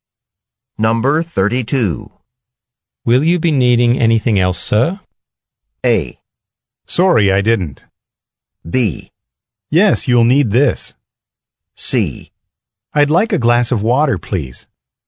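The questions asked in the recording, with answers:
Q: Will you be needing anything else, sir?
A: C: I'd like a glass of water, please.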